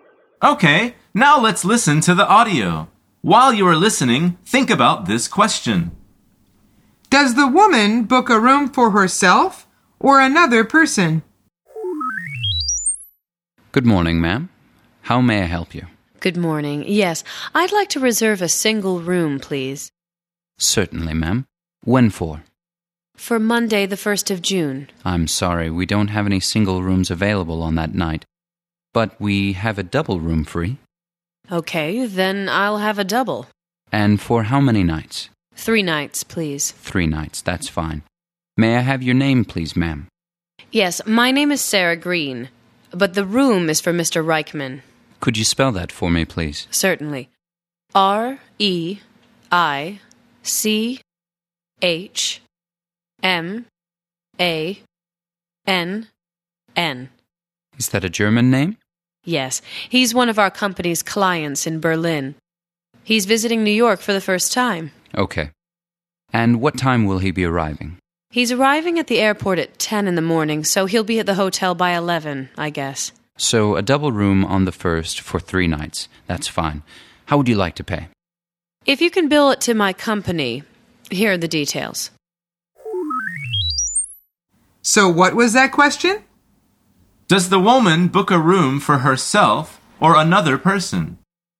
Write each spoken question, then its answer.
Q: Does the woman book a room for herself or another person?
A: The answer is another person.